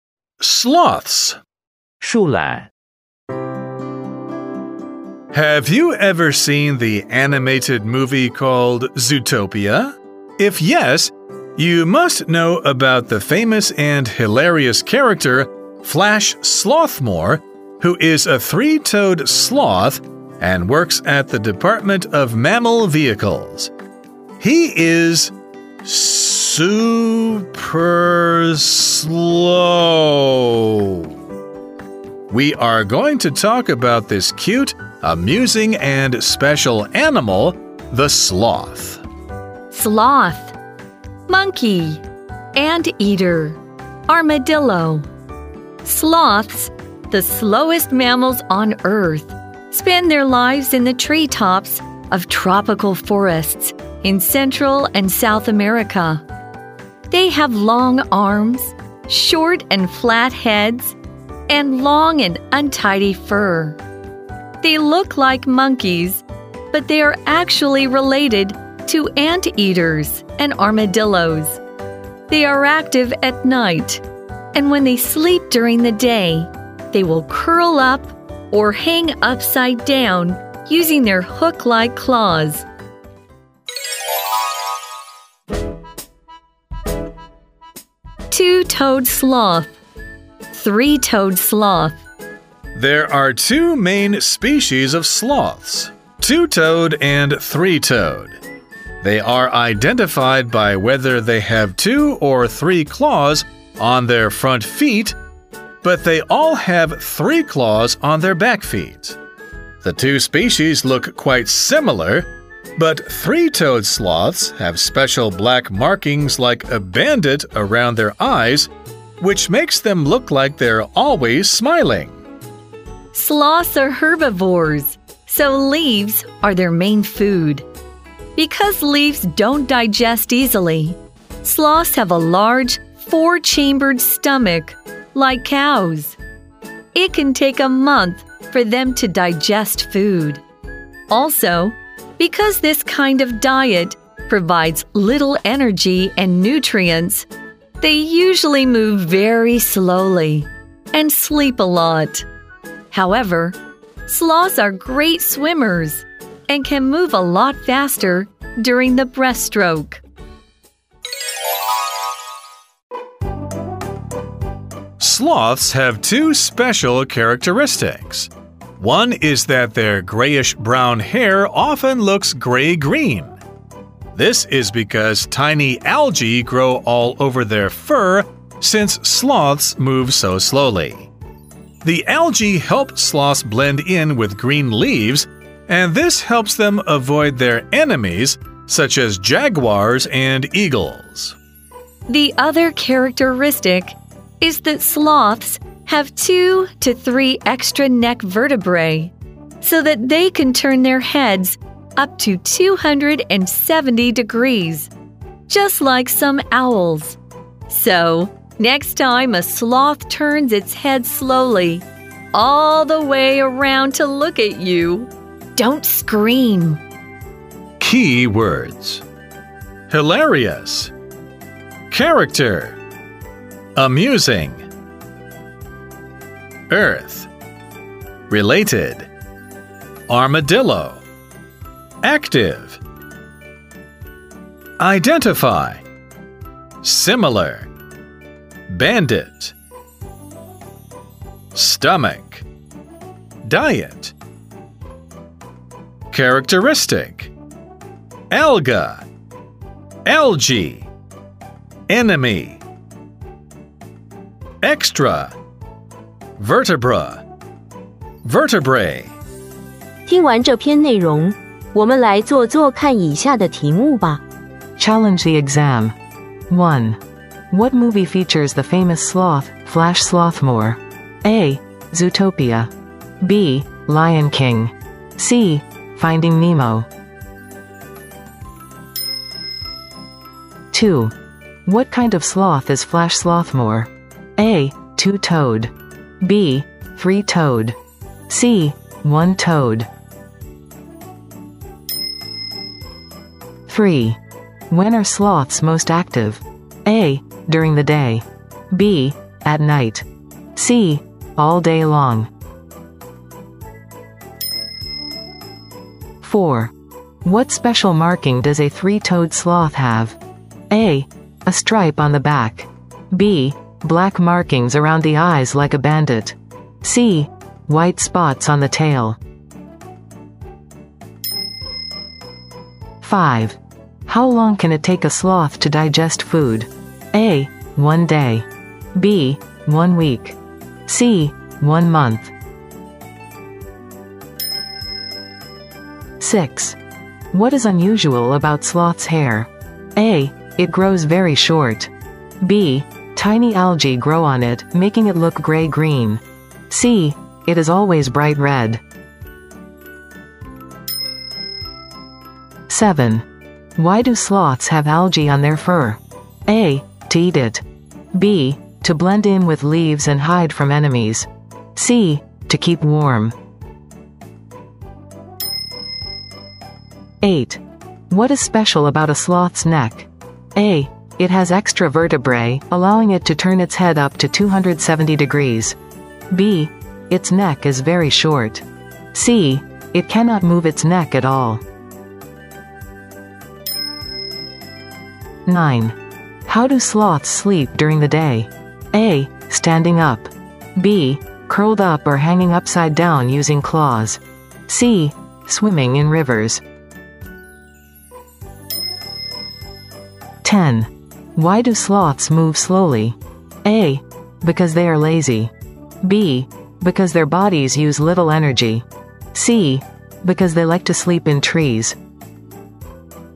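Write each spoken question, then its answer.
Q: What movie features the famous sloth, Flash Slothmore?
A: A: Zootopia

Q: What kind of sloth is Flash Slothmore?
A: B: three-toed

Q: When are sloths most active?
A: B: At night

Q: What special marking does a three-toed sloth have?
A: B: Black markings around the eyes like a bandit

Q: How long can it take a sloth to digest food?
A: C: 1 month

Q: What is unusual about sloth's hair?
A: B: Tiny algae grow on it, making it look gray-green

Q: Why do sloths have algae on their fur?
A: B: To blend in with leaves and hide from enemies

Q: What is special about a sloth's neck?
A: A: It has extra vertebrae, allowing it to turn its head up to 270 degrees

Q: How do sloths sleep during the day?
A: B: Curled up or hanging upside down using claws

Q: Why do sloths move slowly?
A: B: Because their bodies use little energy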